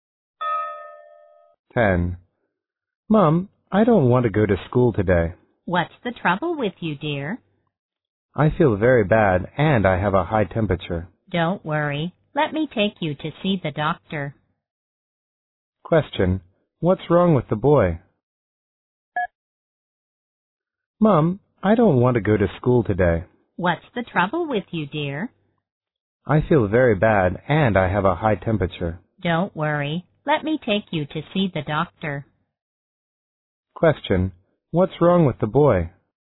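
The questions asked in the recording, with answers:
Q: What's wrong with the boy?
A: He has a high temperature (fever)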